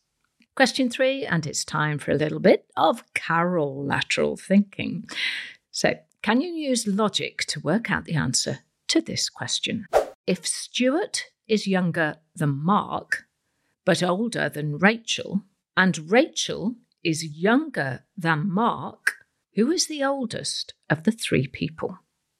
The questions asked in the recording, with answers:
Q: If Stuart is younger than Mark, but older than Rachel, and Rachel is younger than Mark, who is the oldest of the three people?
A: Well, the oldest person is Mark, so well done if you got that right.